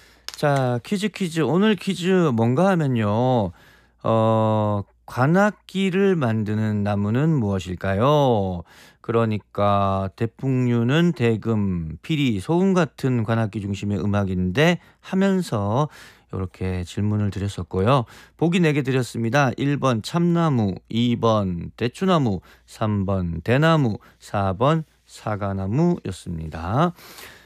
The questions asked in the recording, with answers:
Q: 관악기를 만드는 나무는 무엇일까요?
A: 오늘 정답은 3번 대나무였어요.